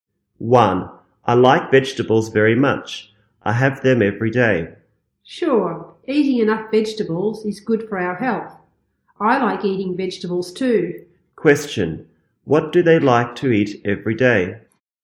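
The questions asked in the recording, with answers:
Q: Question, what do they like to eat every day?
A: Vegetables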